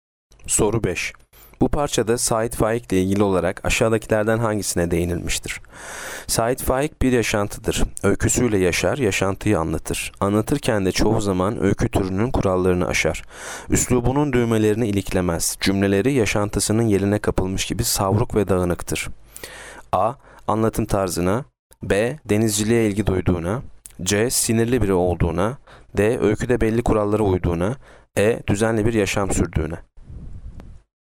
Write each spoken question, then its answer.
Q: Bu parçada Sait Faik ile ilgili olarak aşağıdakilerden hangisine değinilmiştir?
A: Yanıt A. Anlatım tarzına.